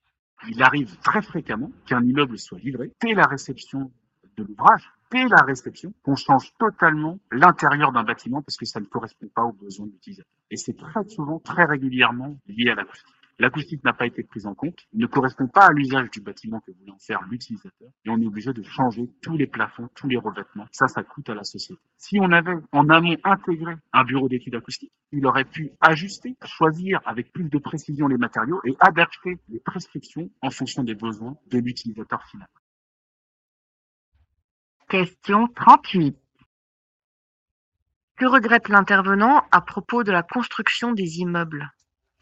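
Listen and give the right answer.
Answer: Que l'acoustique ne soit pas prise en compte en amont, ce qui oblige à refaire l'intérieur.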